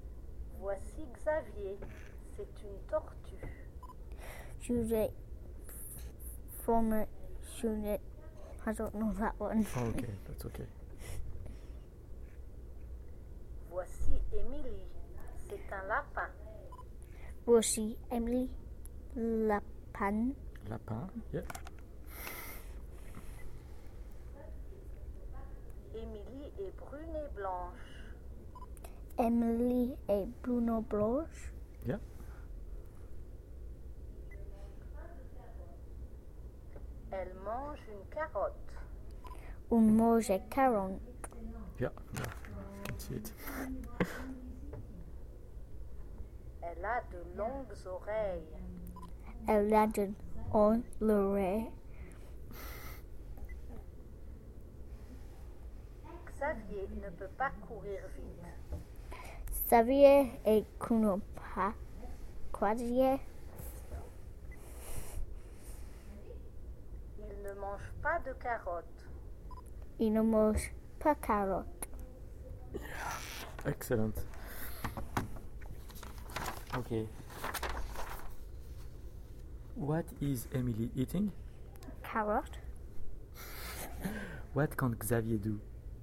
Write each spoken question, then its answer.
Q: What is Emily eating?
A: Carrot.